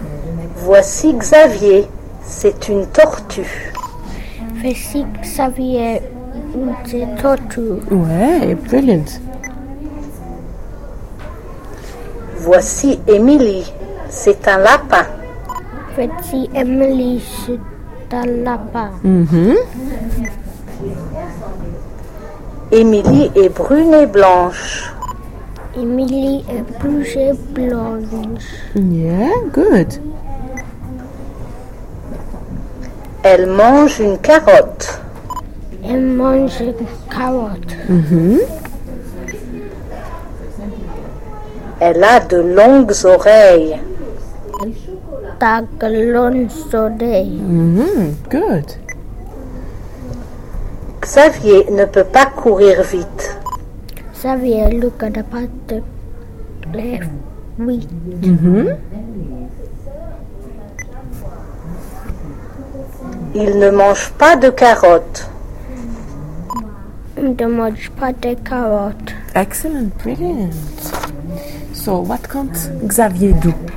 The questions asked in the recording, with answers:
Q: So, what can't Xavier do?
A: Run.